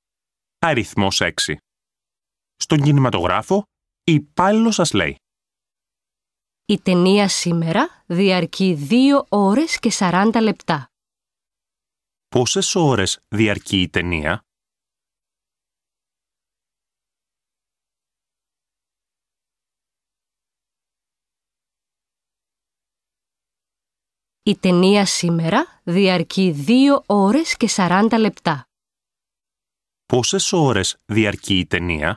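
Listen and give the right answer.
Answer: 2 ώρες και 40 λεπτά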